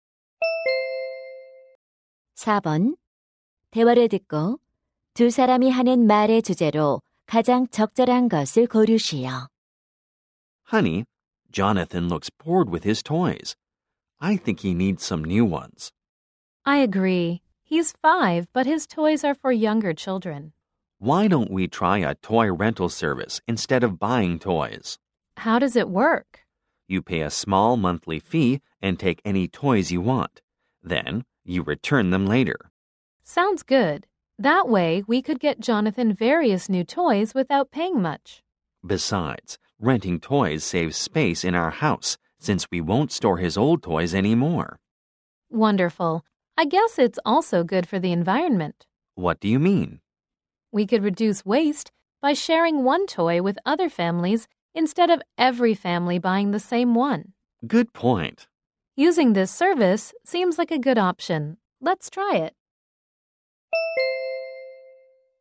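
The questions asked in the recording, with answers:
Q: 대화를 듣고 두 사람이 하는 말의 주제로 가장 적절한 것을 고르시오.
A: 장난감 대여 서비스 이용의 장점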